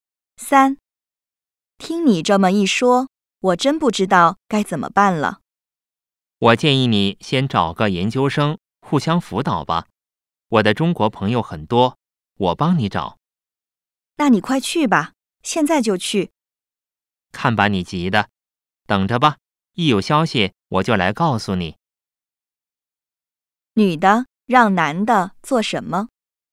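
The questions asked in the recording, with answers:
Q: 女的让男的做什么?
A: 马上去帮她找研究生互相辅导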